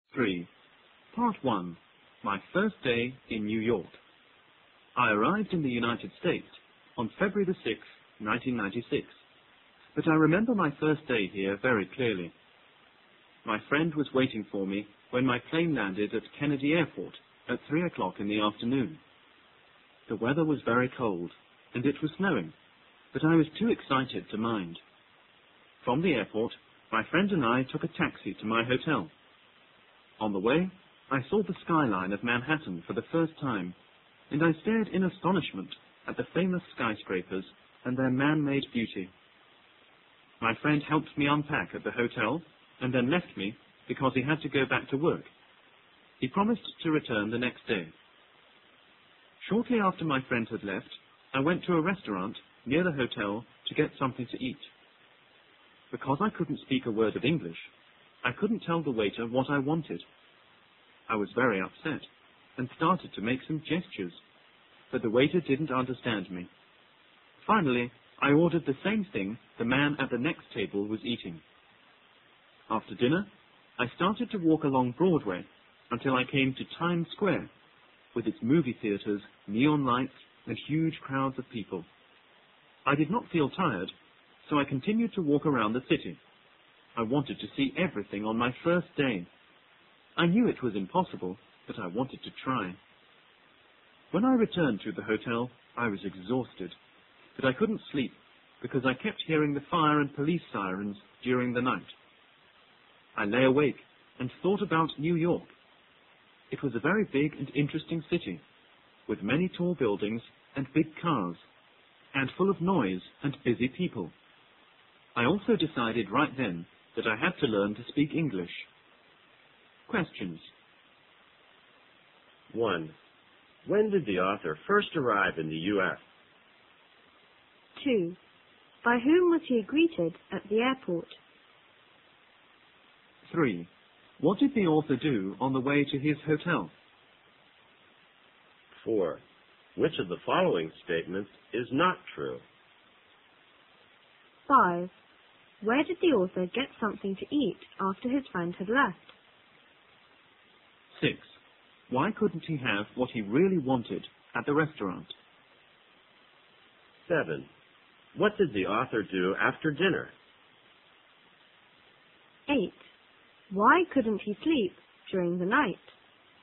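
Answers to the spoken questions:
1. On February 6th, 1996
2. By his friend
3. He saw the Manhattan skyline for the first time and stared at the skyscrapers
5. At a restaurant near the hotel
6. He couldn't speak English, so he couldn't tell the waiter what he wanted
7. He walked along Broadway to Times Square and around the city
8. He kept hearing fire and police sirens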